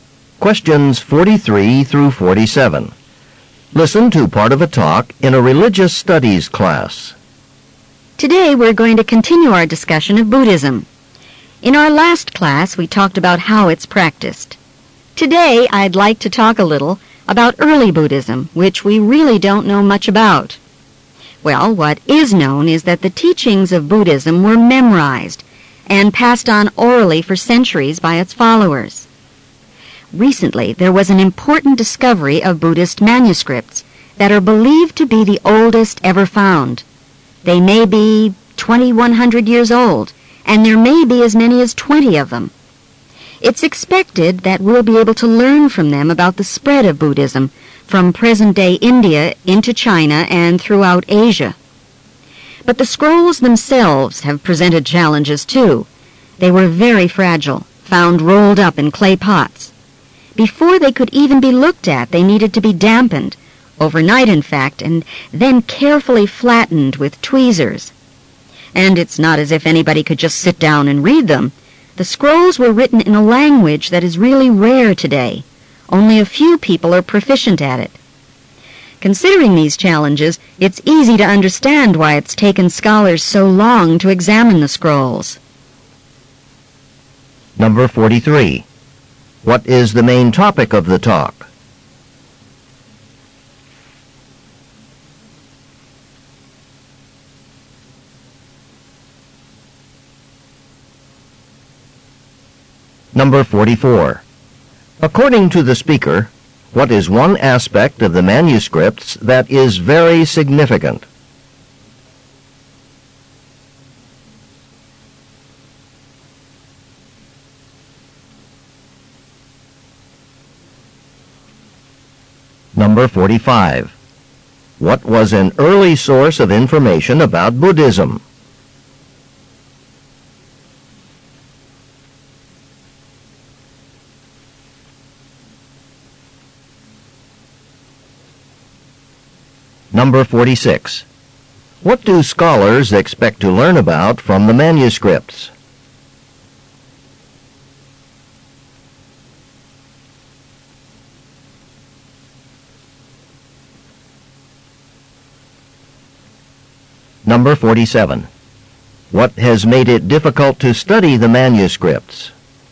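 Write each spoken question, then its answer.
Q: What is the main topic of the talk?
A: Newly found ancient Buddhist manuscripts

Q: According to the speaker, what is one aspect of the manuscripts that is very significant?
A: They are the oldest ever found.

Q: What was an early source of information about Buddhism?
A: Teachings memorized and passed on orally

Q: What do scholars expect to learn about from the manuscripts?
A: The spread of Buddhism from India into China and Asia

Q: What has made it difficult to study the manuscripts?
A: They are fragile and written in a rare language.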